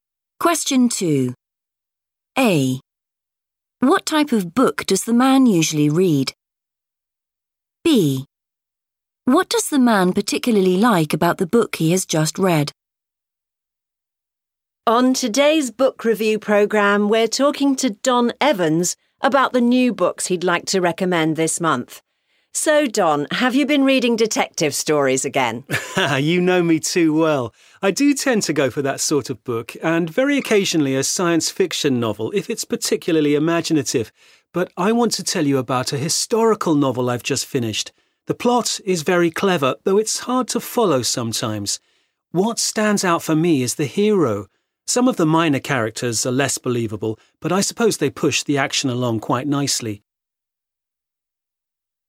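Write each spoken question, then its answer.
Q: What type of book does the man usually read?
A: detective stories

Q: What does the man particularly like about the book he has just read?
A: the hero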